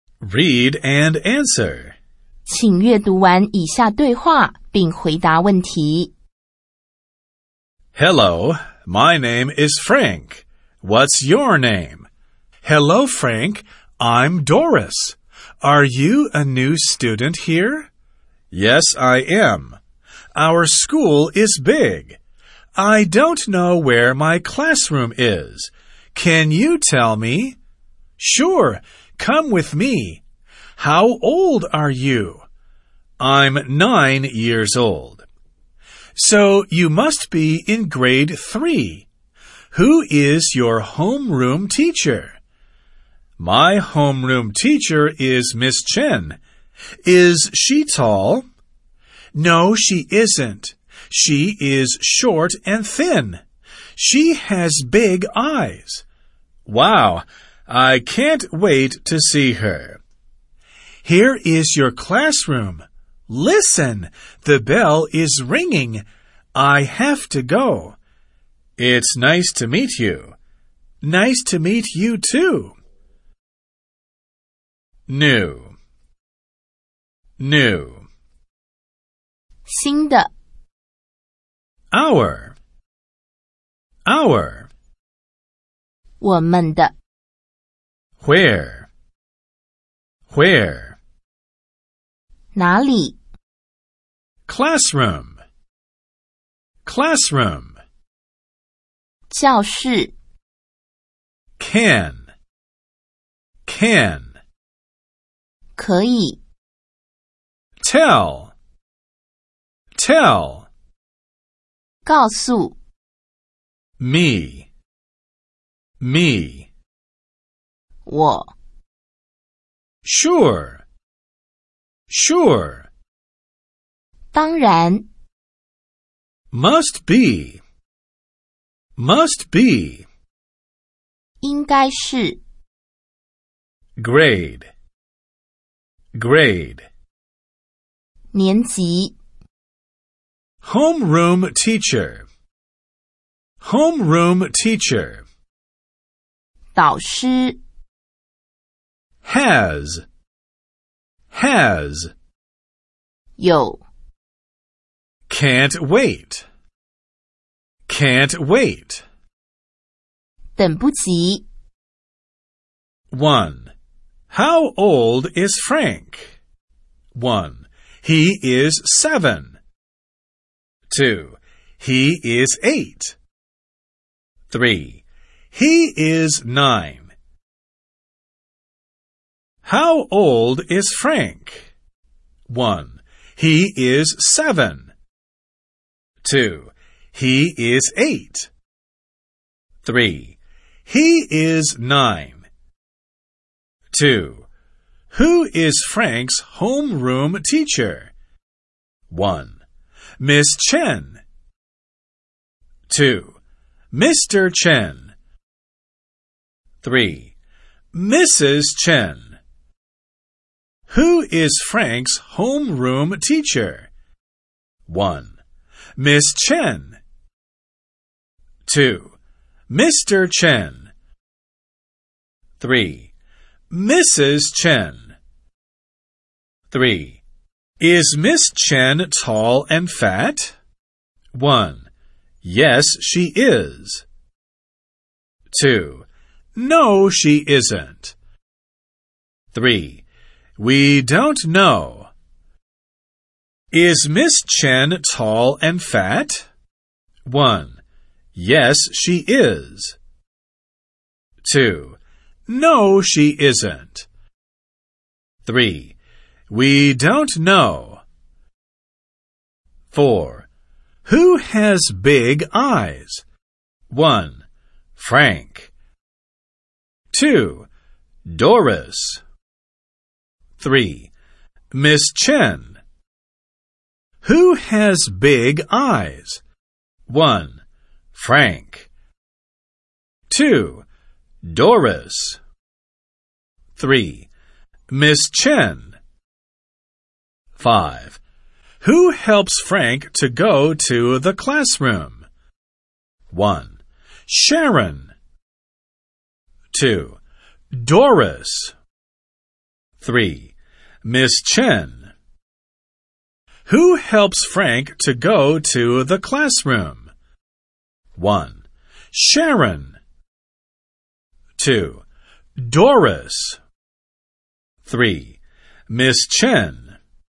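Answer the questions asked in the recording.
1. 3: He is 9.
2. 1: Miss Chen.
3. 2: No, she isn't.
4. 3: Miss Chen.
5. 2: Doris.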